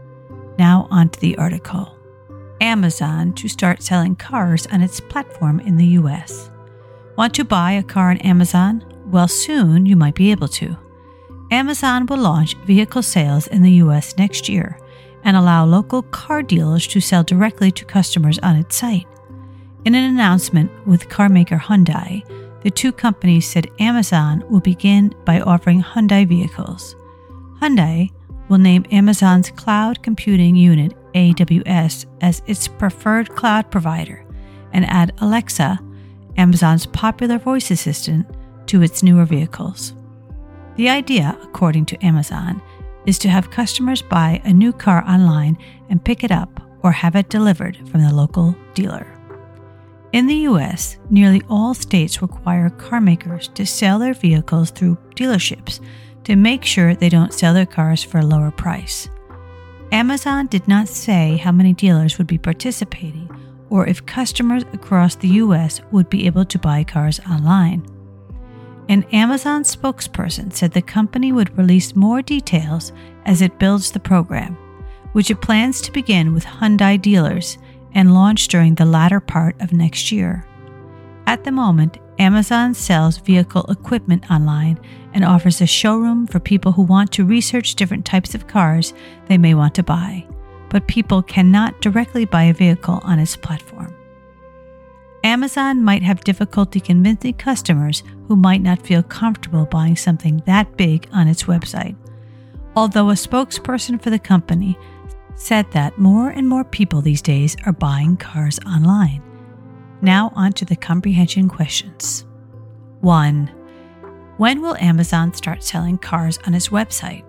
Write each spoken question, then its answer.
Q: When will Amazon start selling cars on its website?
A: Amazon will launch vehicle sales in the U.S. next year.